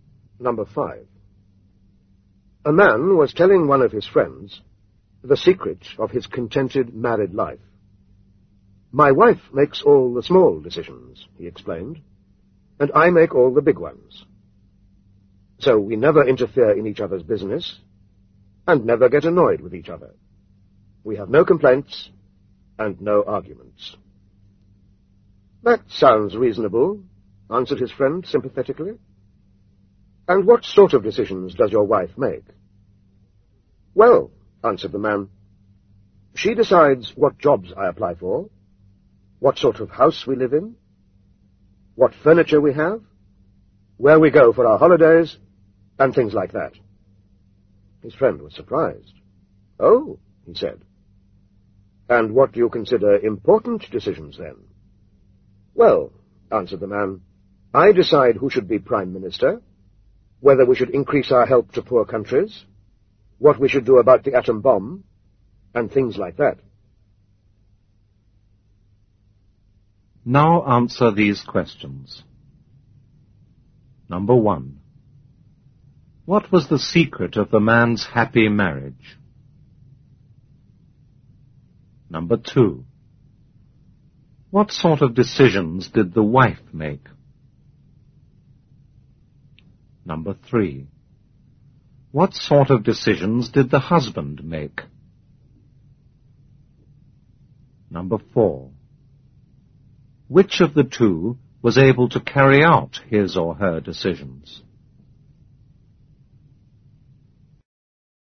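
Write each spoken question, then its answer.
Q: What was the secret of the man's happy marriage?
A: His wife made all the small decisions and he made all the big ones

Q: What sort of decisions did the wife make?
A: What jobs he applied for, what house they lived in, what furniture they had, where they went for holidays

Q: What sort of decisions did the husband make?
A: Who should be Prime Minister, whether to increase help to poor countries, what to do about the atom bomb

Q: Which of the two was able to carry out his or her decisions?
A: The wife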